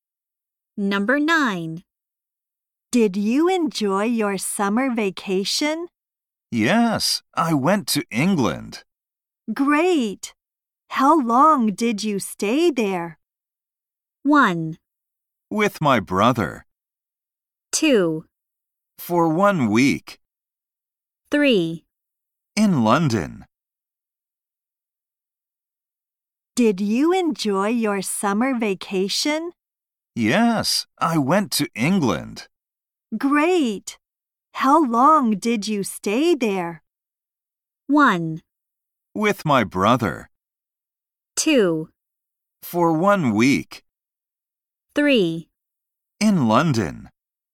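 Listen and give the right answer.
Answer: 2: For 1 week.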